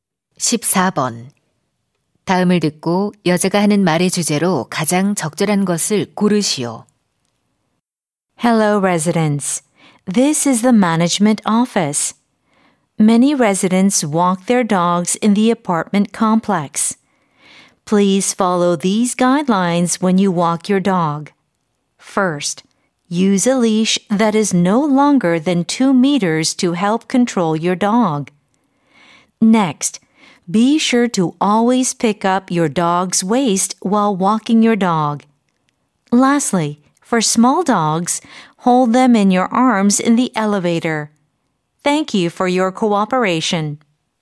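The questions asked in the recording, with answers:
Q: 다음을 듣고 여자가 하는 말의 주제로 가장 적절한 것을 고르시오.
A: 아파트 단지 내 반려견 산책 시 지켜야 할 지침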